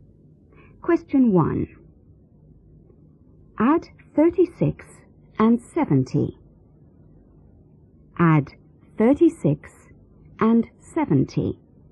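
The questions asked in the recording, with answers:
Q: Add 36 and 70.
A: 106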